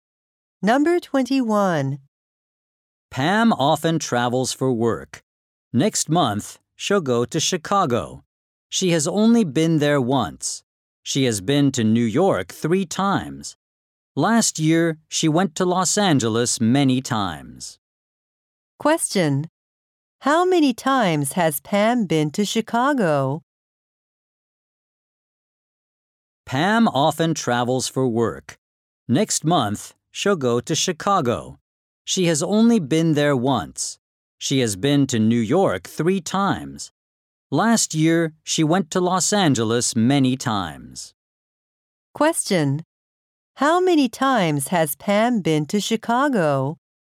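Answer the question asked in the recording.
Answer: Once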